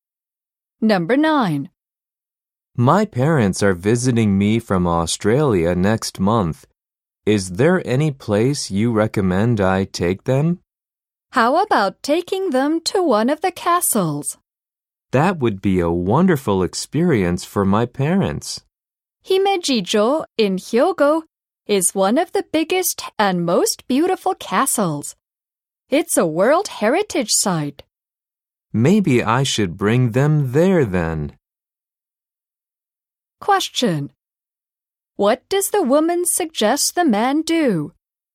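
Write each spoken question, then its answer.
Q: What does the woman suggest the man do?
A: Take his parents to a castle such as Himeji-jo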